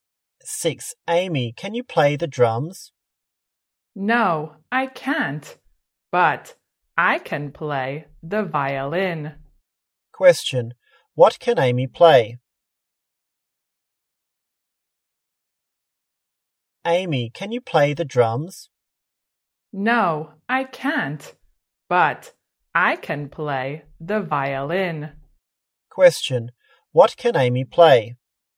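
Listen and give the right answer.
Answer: the violin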